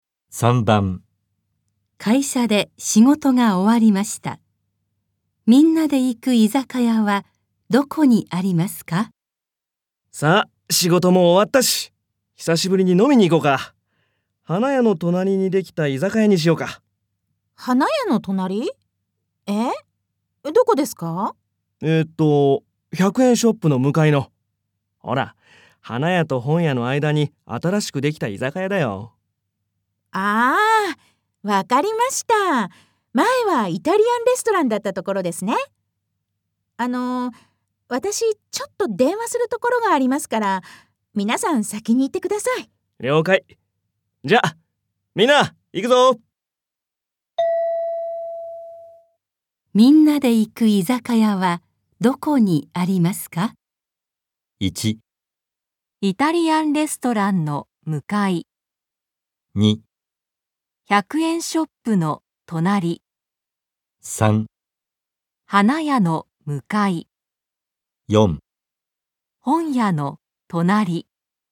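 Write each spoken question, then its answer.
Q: みんなで行く居酒屋はどこにありますか?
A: 4: 本屋の隣。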